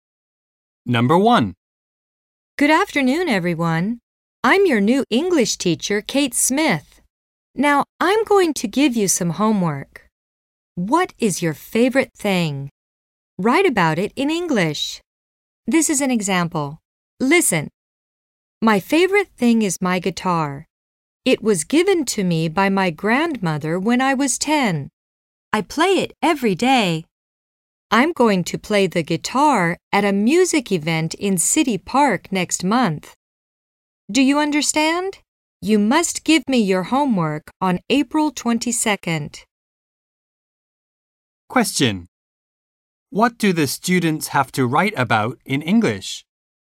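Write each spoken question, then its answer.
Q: What do the students have to write about in English?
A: Their favorite thing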